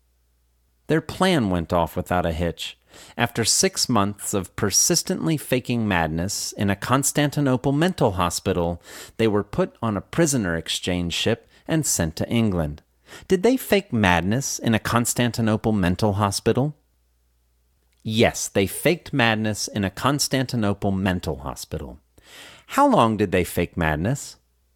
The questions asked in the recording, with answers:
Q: How long did they fake madness?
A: They faked madness for 6 months.